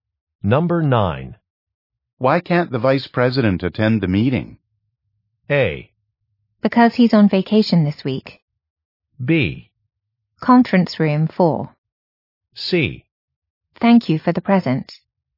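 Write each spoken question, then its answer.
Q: Why can't the Vice President attend the meeting?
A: A: Because he's on vacation this week.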